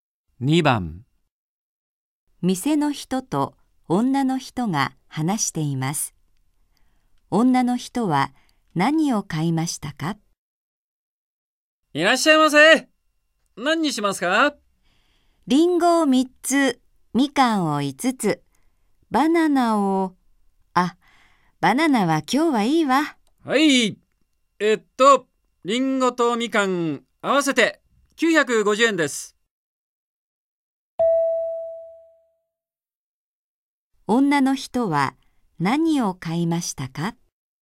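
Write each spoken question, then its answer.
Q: 女の人は何を買いましたか?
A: リンゴ3つとみかん5つ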